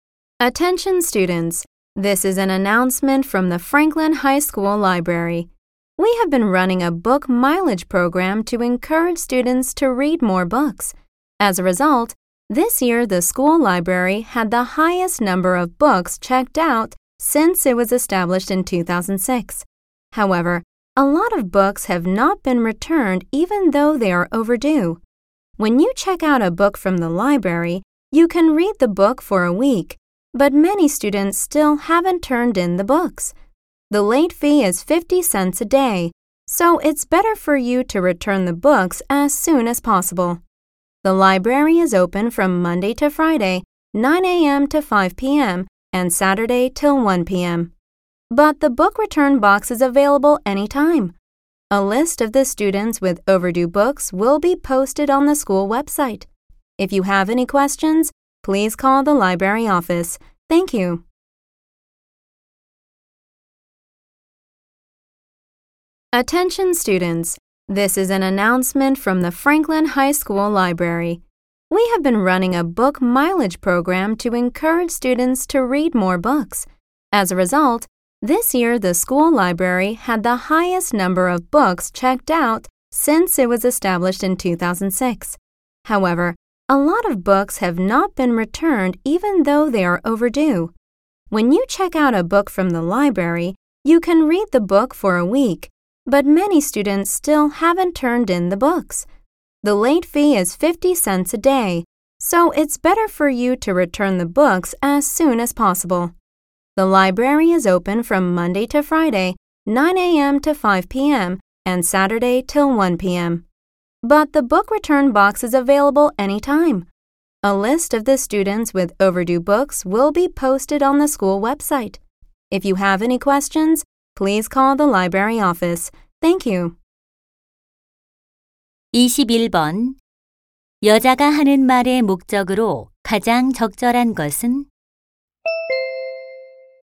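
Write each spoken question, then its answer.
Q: 여자가 하는 말의 목적으로 가장 적절한 것은?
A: 연체된 도서의 반납을 독려하려고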